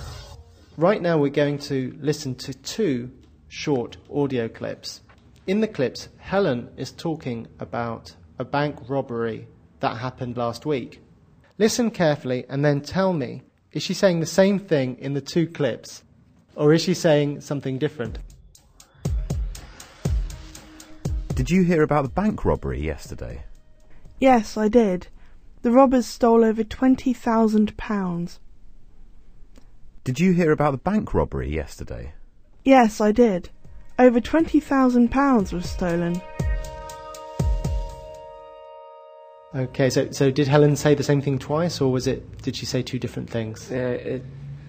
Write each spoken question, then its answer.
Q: Okay, so did Helen say the same thing twice, or did she say two different things?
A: The two dialogues had the same meaning, but the grammar was slightly different.